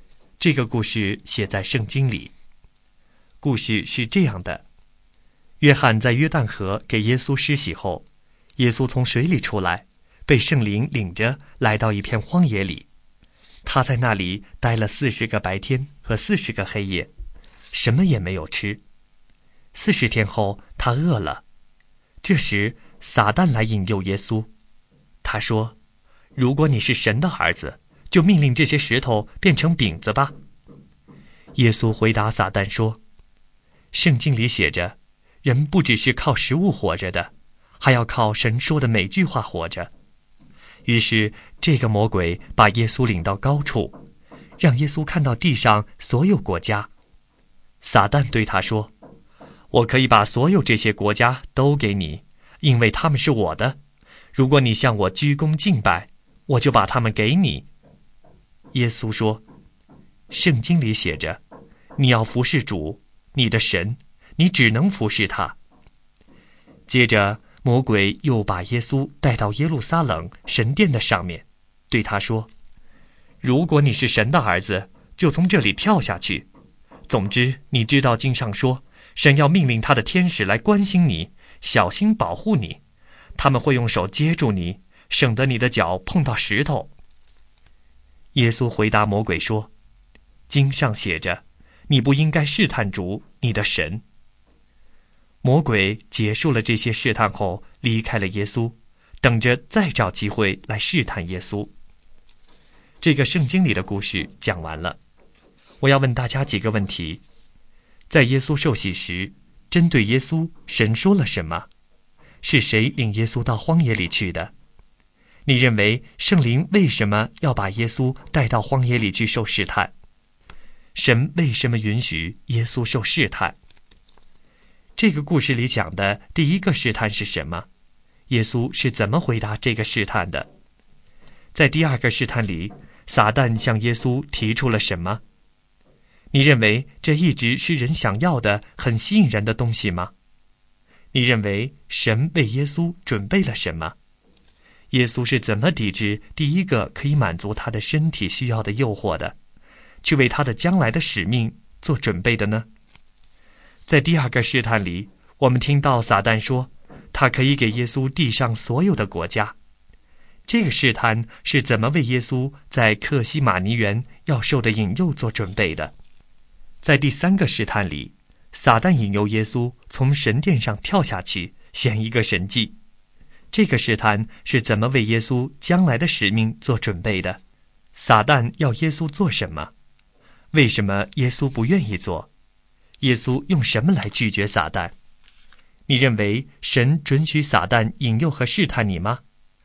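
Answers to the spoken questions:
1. 圣灵
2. 撒旦要耶稣命令石头变成饼
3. 人不只是靠食物活着,还要靠神说的每句话活着
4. 如果耶稣向他鞠躬敬拜,就把地上所有国家给他
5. 从神殿上面跳下去
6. 用圣经上写的话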